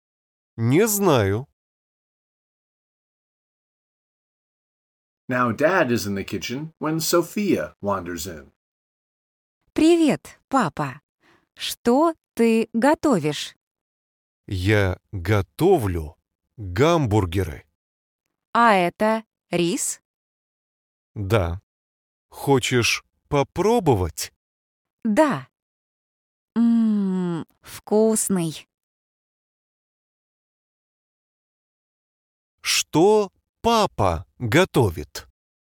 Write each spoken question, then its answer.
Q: Что папа готовит?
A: Папа готовит гамбургеры.